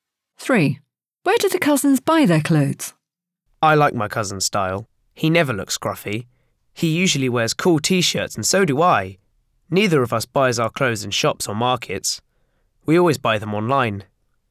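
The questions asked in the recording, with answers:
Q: Where do the cousins buy their clothes?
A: Online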